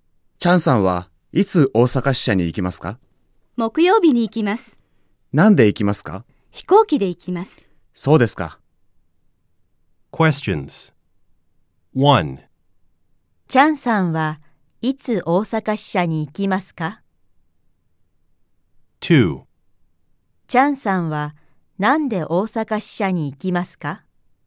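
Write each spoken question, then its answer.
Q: チャンさんはいつ大阪支社に行きますか?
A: 木曜日に行きます。

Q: チャンさんはなんで大阪支社に行きますか?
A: 飛行機で行きます。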